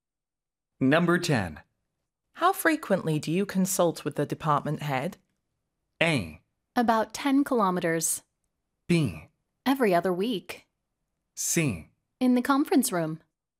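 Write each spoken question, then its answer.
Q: How frequently do you consult with the department head?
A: B: Every other week.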